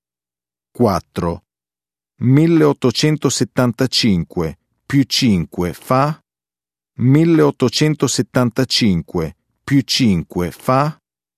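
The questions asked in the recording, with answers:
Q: 1875 più 5 fa?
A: 1880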